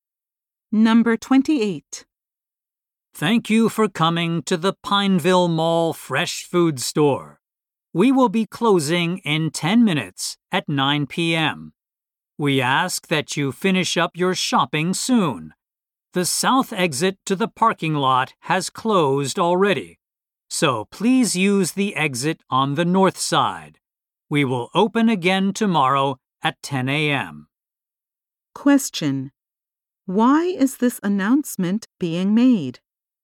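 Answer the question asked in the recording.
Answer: The store will close soon, in 10 minutes.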